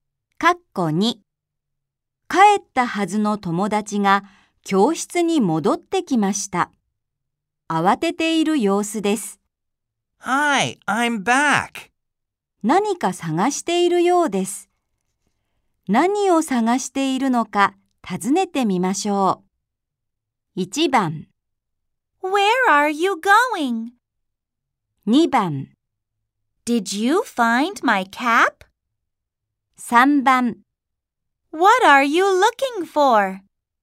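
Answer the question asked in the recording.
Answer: 3: What are you looking for?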